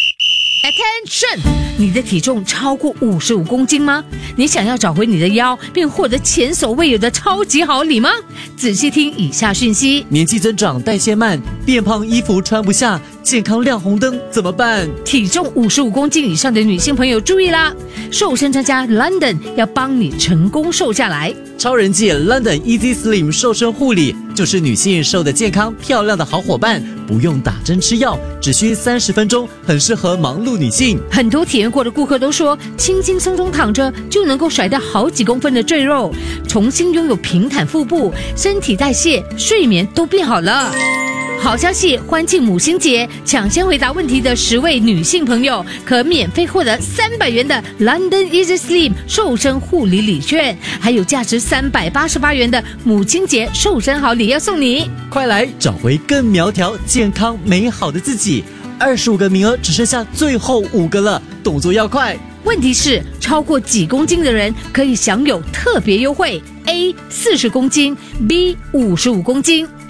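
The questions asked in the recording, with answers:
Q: 问题是,超过几公斤的人可以享有特别优惠? A 40公斤, B 55公斤。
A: B: 55公斤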